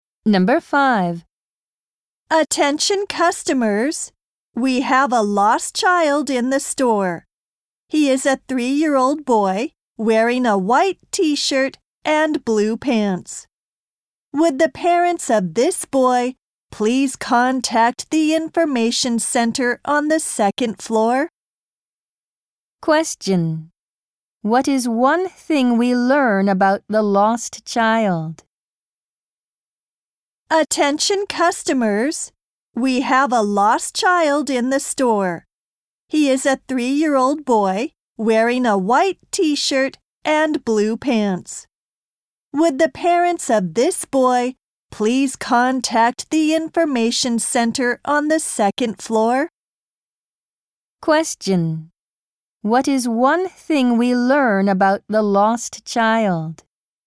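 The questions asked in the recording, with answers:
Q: What is one thing we learn about the lost child?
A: He is a 3-year-old boy wearing a white t-shirt and blue pants.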